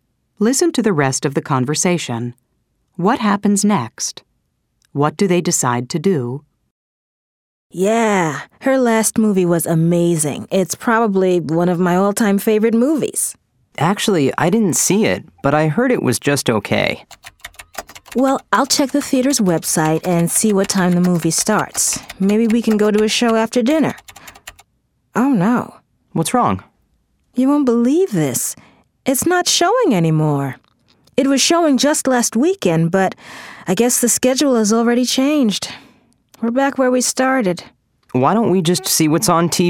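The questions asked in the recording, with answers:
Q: What happens next? What do they decide to do?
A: The movie isn't showing anymore, so they decide to see what's on TV tonight.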